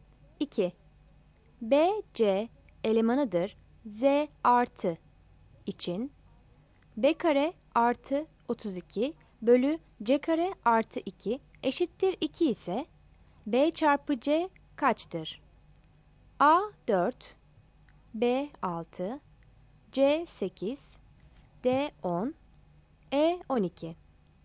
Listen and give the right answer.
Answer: Yanıt C'dir.